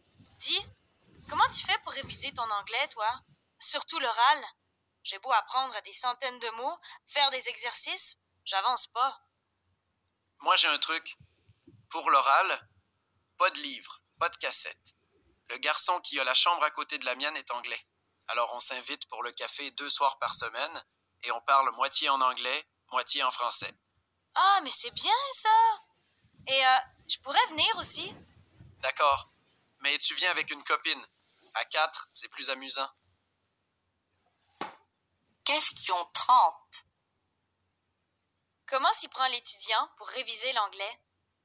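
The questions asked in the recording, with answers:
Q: Comment s'y prend l'étudiant pour réviser l'anglais?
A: Il parle avec son voisin anglais, moitié en anglais, moitié en français, deux soirs par semaine.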